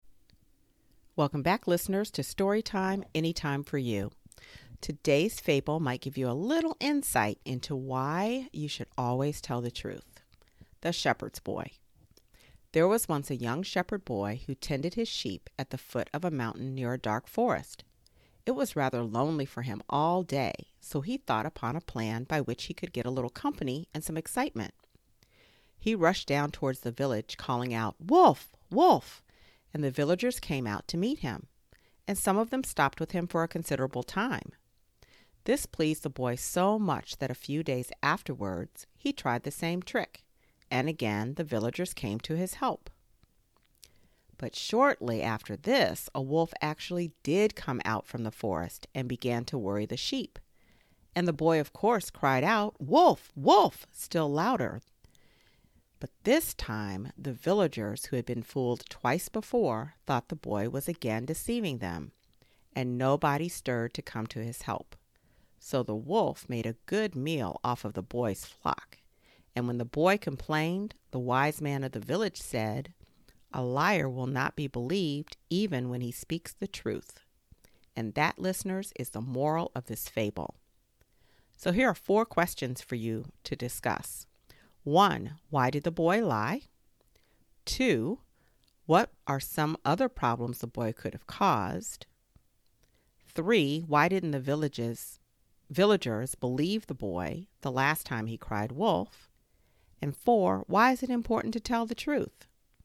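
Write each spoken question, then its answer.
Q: Why did the boy lie?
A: He was lonely and wanted company and some excitement.

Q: Why didn't the villages, villagers believe the boy the last time he cried wolf?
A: He had fooled them twice before, so they thought he was deceiving them again.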